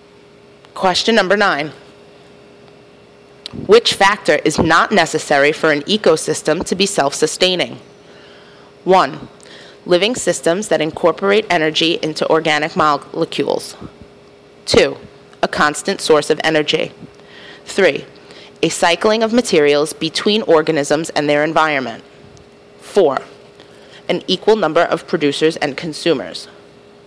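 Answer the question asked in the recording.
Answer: 4: An equal number of producers and consumers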